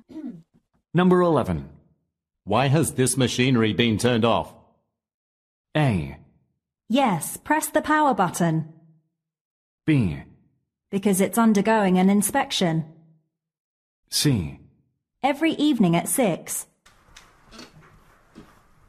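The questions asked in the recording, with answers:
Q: Why has this machinery been turned off?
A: B: Because it's undergoing an inspection.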